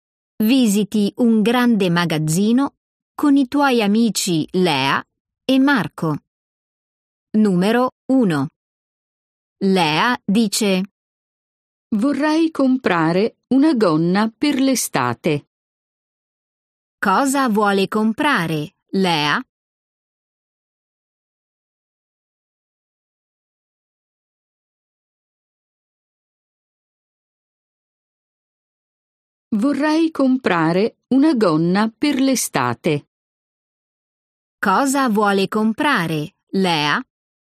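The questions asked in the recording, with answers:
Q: Cosa vuole comprare, Lea?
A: una gonna per l'estate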